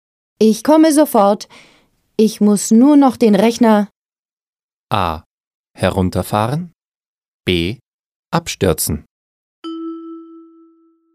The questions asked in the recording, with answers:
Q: Ich komme sofort. Ich muss nur noch den Rechner.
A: A. Ich muss nur noch den Rechner herunterfahren.